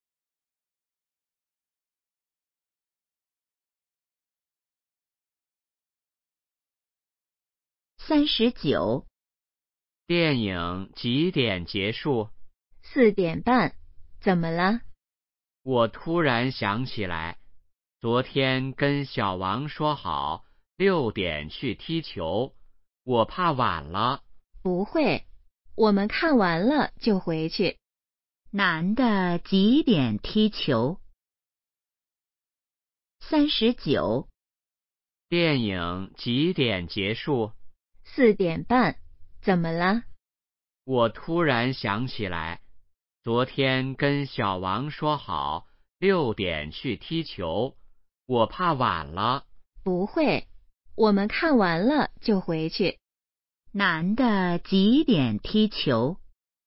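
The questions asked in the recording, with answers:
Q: 男的几点踢球?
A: 6点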